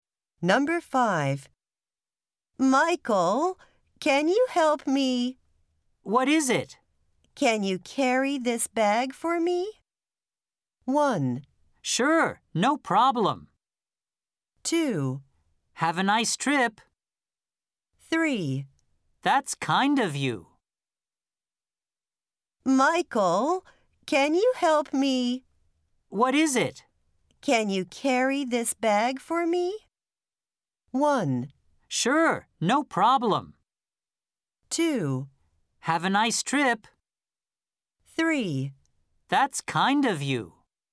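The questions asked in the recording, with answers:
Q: Can you carry this bag for me?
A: 1: Sure, no problem.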